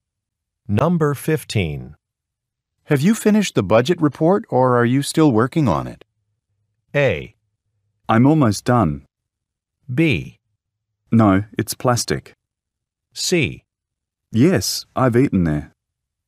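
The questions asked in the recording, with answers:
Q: Have you finished the budget report, or are you still working on it?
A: A: I'm almost done.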